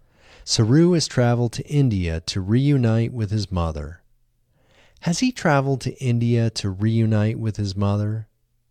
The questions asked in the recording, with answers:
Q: Has he traveled to India to reunite with his mother?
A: Yes, he has traveled to India to reunite with his mother.